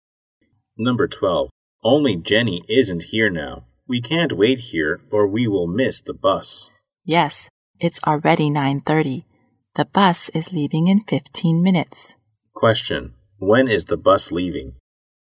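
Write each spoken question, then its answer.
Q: When is the bus leaving?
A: At 9:45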